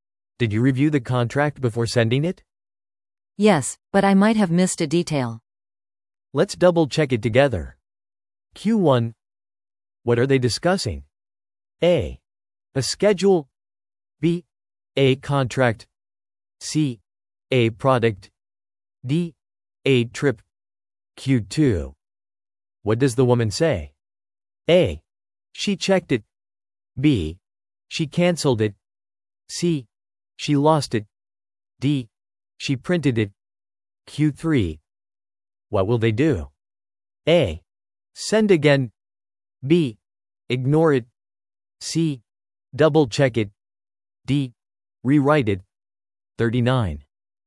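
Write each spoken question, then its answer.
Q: What are they discussing?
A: B: A contract.

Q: What does the woman say?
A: A: She checked it.

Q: What will they do?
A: C: Double check it.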